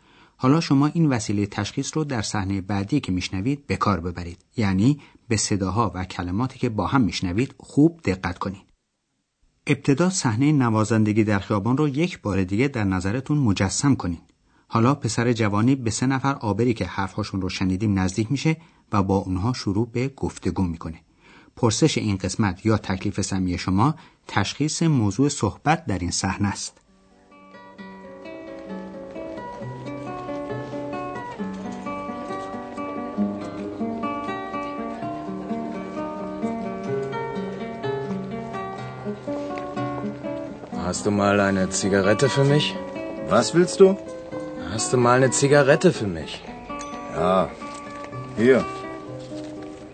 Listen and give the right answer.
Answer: پسر جوان میخواست از کسی یک سیگار بگیره